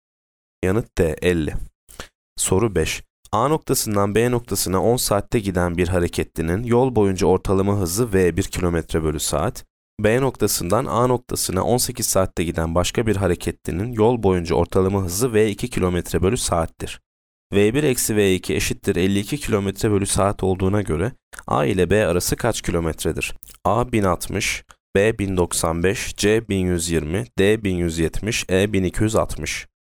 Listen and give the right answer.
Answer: Yanıt D 1170.